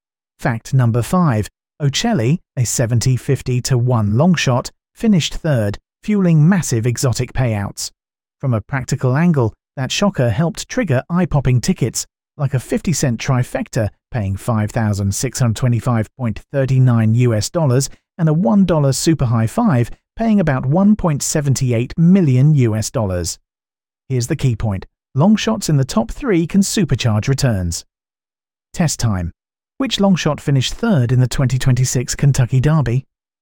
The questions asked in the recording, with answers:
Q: Which long shot finished third in the 2026 Kentucky Derby?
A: Correct answer, Ocelli.